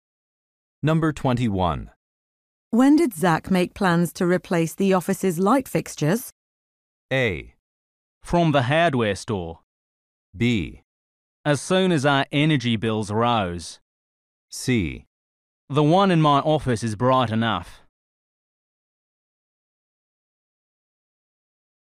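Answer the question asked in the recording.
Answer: B: As soon as our energy bills rose.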